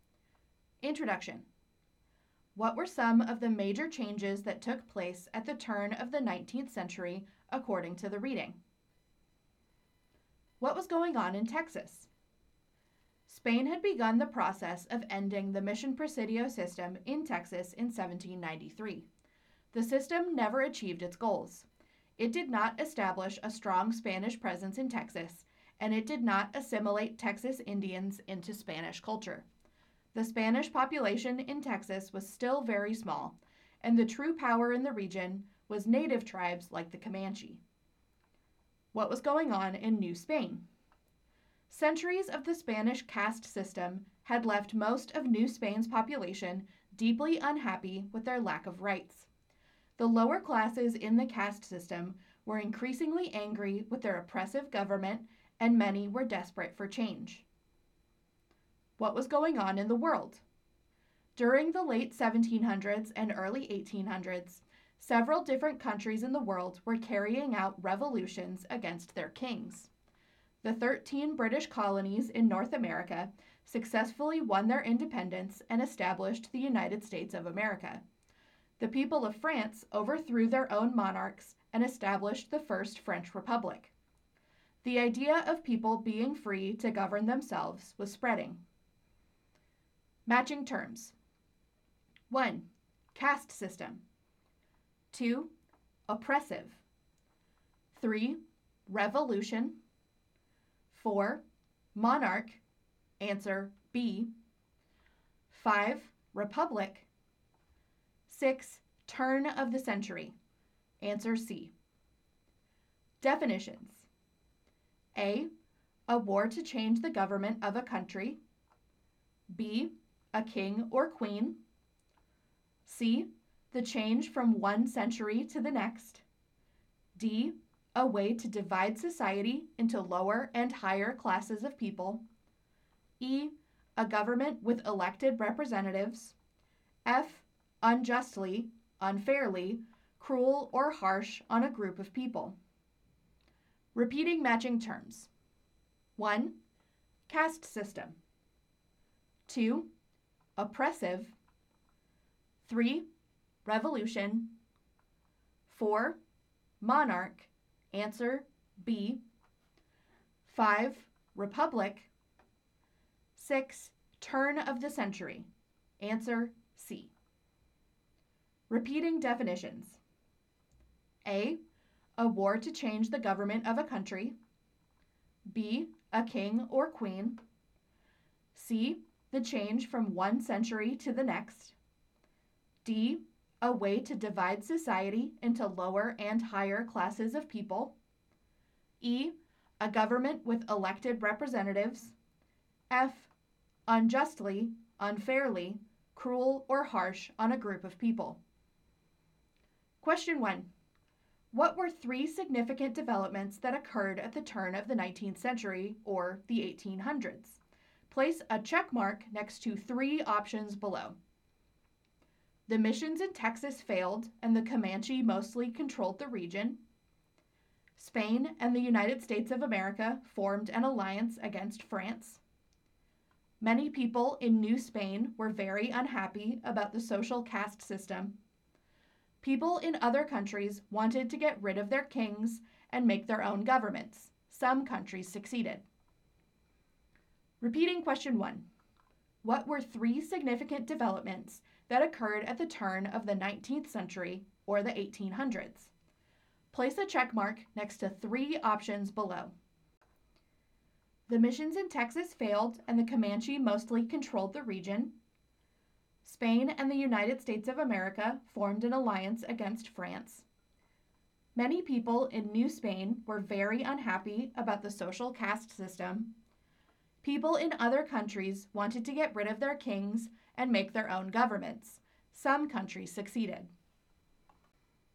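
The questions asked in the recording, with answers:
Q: What were three significant developments that occurred at the turn of the 19th century, or the 1800s?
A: The missions in Texas failed and the Comanche mostly controlled the region; many people in New Spain were very unhappy about the social caste system; people in other countries wanted to get rid of their kings and make their own governments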